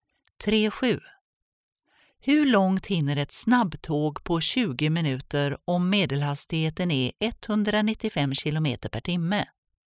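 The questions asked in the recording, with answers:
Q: Hur långt hinner ett snabbtåg på 20 minuter om medelhastigheten är 195 km per timme?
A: 65 km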